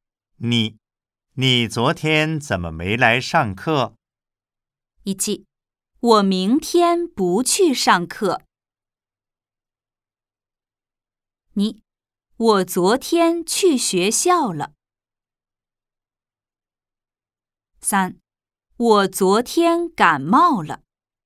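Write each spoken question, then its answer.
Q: 你昨天怎么没来上课?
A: 3: 我昨天感冒了。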